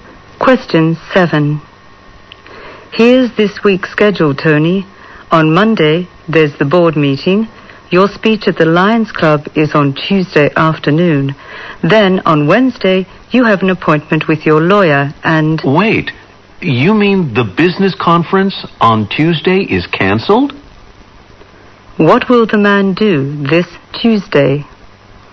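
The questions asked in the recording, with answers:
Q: What will the man do this Tuesday?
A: Give a speech at the Lions Club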